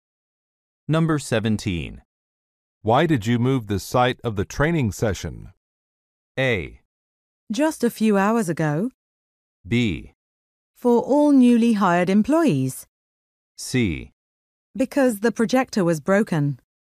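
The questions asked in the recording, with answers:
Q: Why did you move the site of the training session?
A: C: Because the projector was broken.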